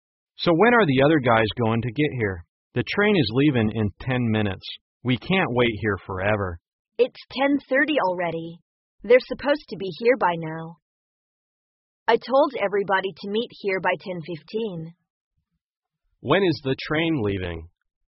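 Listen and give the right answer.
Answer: At 10:40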